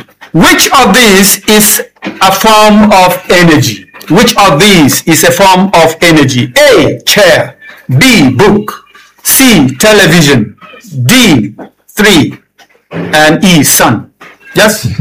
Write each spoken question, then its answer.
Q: Which of these is a form of energy?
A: E, sun.